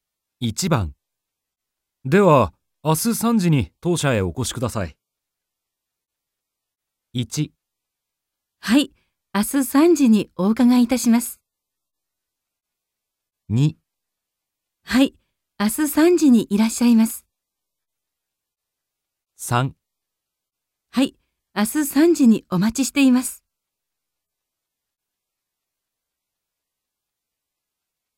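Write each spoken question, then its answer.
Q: では明日3時に当社へお越しください。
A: 1: はい、明日3時にお伺いいたします。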